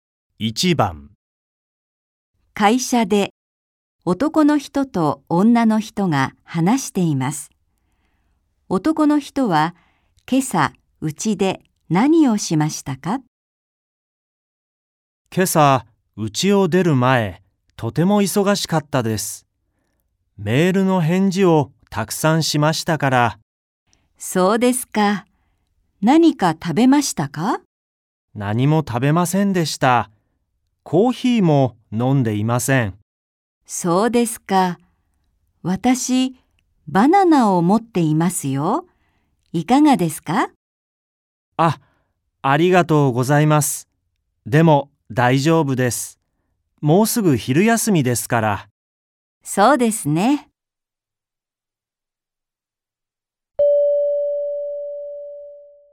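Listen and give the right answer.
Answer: メールの返事をたくさんしました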